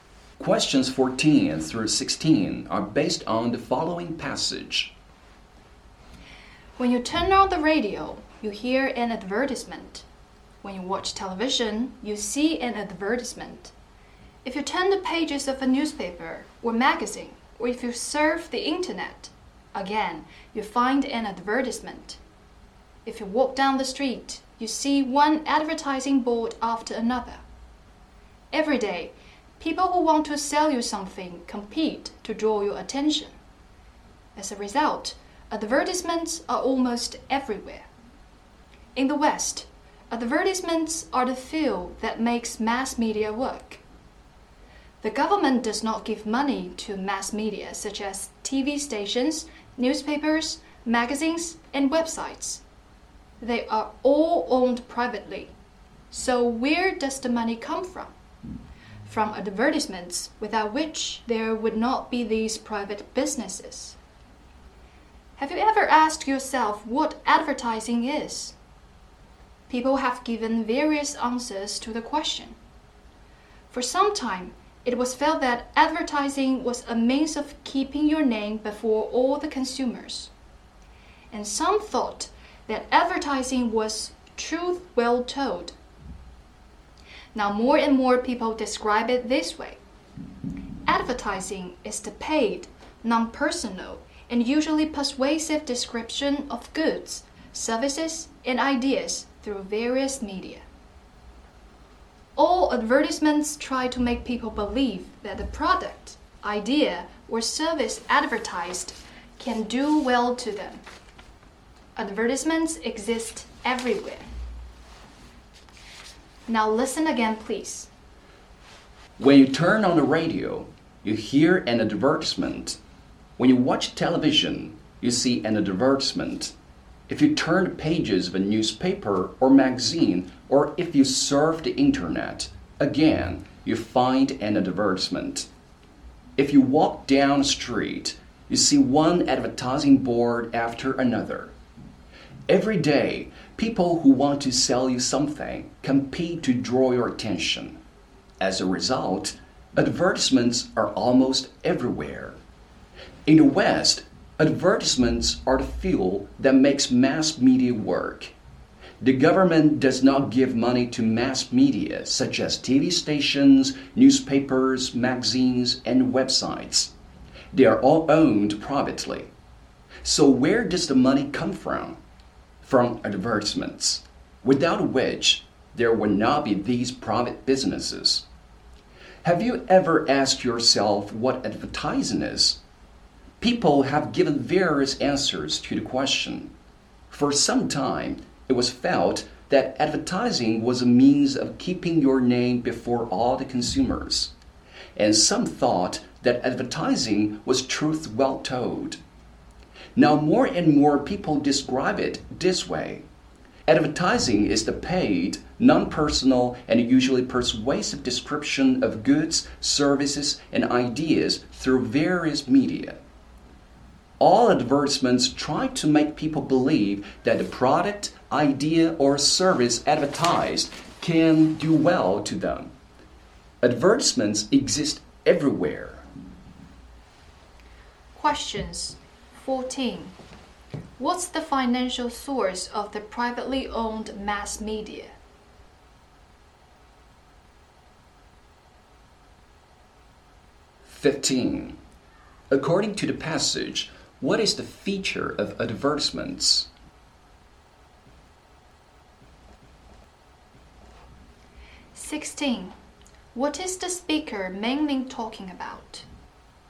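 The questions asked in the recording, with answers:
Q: What's the financial source of the privately owned mass media?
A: Advertisements

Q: What is the speaker mainly talking about?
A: Advertising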